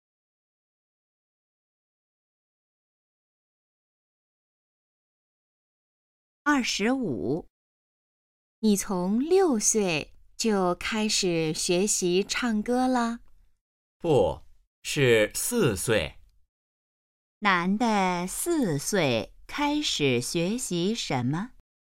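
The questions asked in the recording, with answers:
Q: 男的四岁开始学习什么?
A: 唱歌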